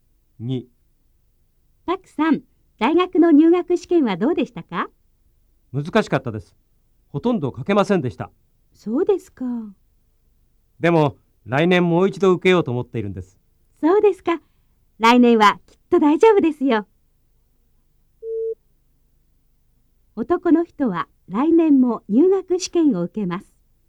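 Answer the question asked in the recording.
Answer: ○(正しい)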